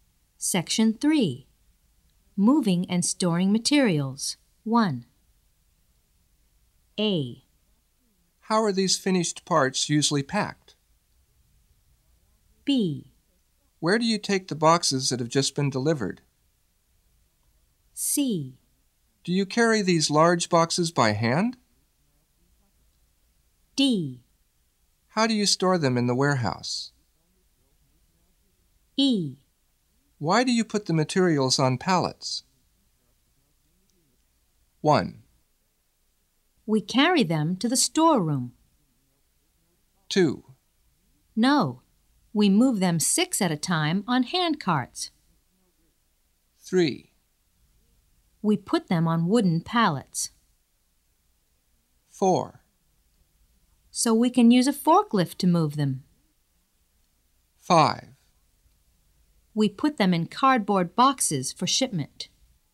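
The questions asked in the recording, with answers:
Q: How are these finished parts usually packed?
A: 5: We put them in cardboard boxes for shipment.

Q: Where do you take the boxes that have just been delivered?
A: 1: We carry them to the storeroom.

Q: Do you carry these large boxes by hand?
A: 2: No, we move them 6 at a time on hand carts.

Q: How do you store them in the warehouse?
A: 3: We put them on wooden pallets.

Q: Why do you put the materials on pallets?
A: 4: So we can use a forklift to move them.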